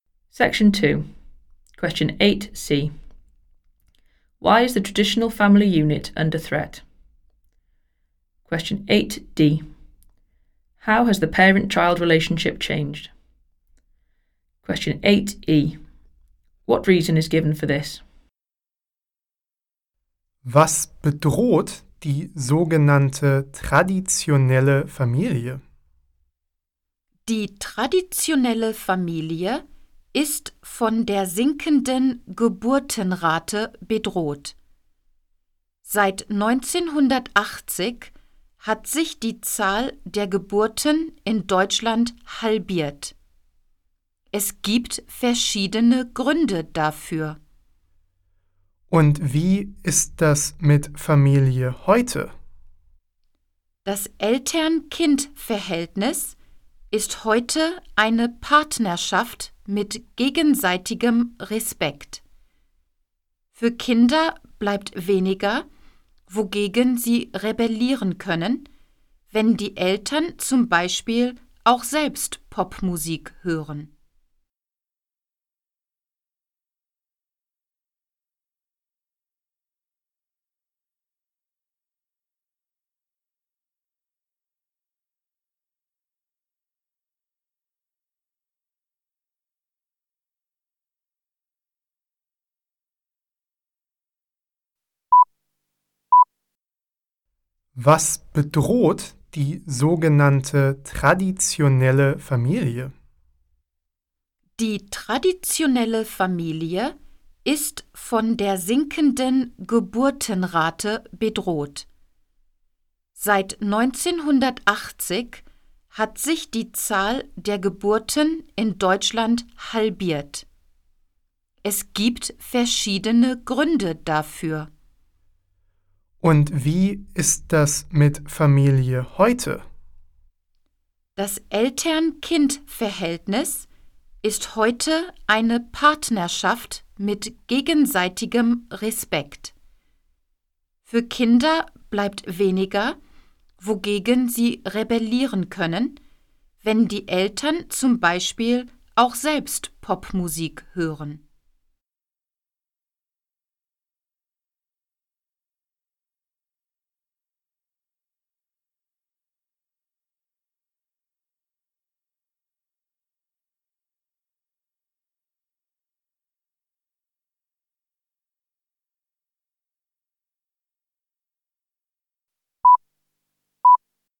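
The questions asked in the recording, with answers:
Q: Why is the traditional family unit under threat?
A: The falling birth rate

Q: How has the parent-child relationship changed?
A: It is now a partnership with mutual respect

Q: What reason is given for this?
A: Children have less to rebel against, e.g. parents listen to pop music too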